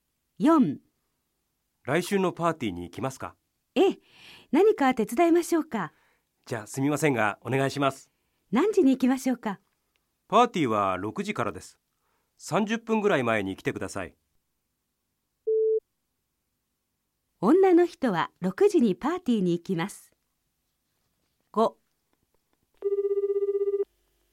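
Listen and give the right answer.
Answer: ×(5時半ごろに行きます)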